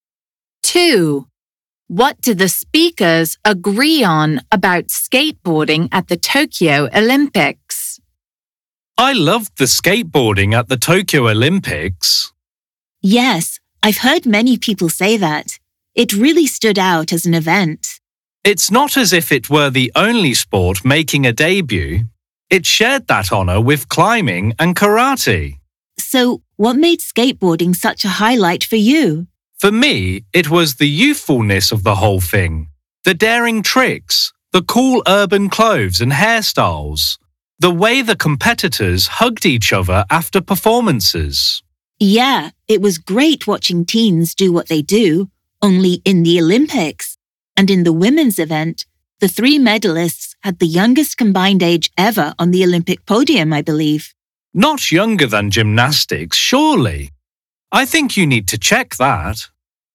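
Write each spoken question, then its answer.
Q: What do the speakers agree on about skateboarding at the Tokyo Olympics?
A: Its youthfulness made it a highlight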